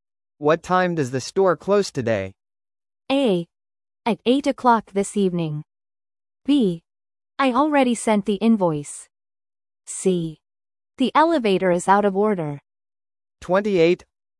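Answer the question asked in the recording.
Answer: A: At 8 o'clock this evening.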